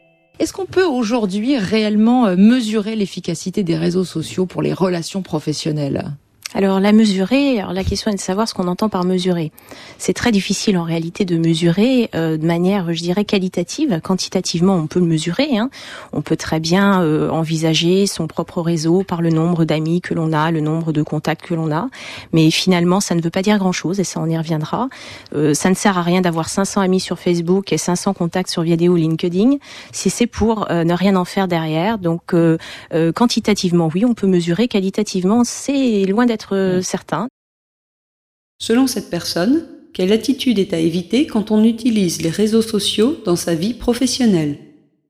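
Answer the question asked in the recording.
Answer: Avoir beaucoup d'amis ou de contacts sans rien en faire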